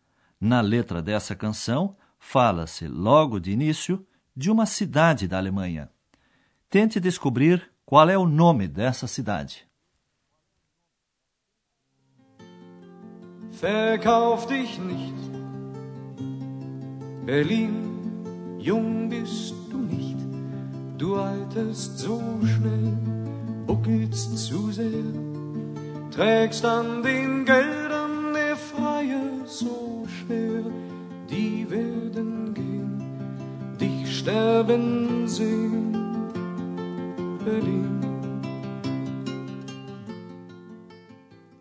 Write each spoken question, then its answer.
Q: Tente descobrir qual é o nome dessa cidade?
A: Berlim. Berlim.